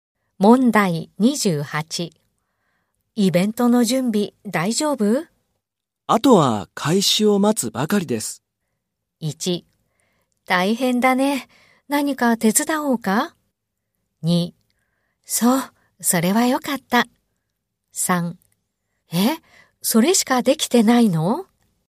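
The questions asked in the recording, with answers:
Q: イベントの準備大丈夫?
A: 3: そう、それはよかった。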